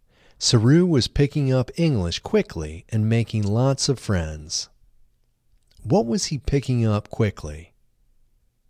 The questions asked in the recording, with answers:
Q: What was he picking up quickly?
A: He was picking up English quickly.